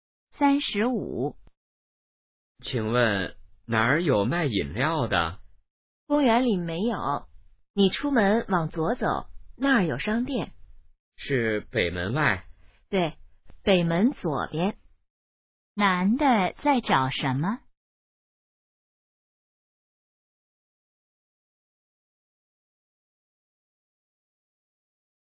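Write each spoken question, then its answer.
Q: 男的在找什么?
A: 卖饮料的地方(商店)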